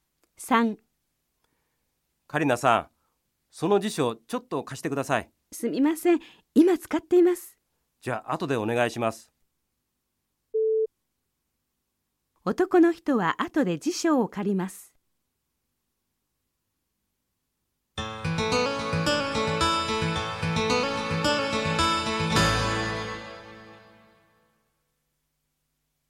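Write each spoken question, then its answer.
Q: 男の人は後で辞書を借ります。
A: ○(正しい)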